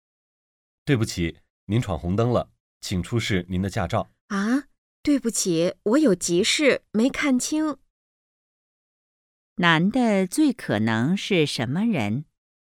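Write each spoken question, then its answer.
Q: 男的最可能是什么人?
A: 警察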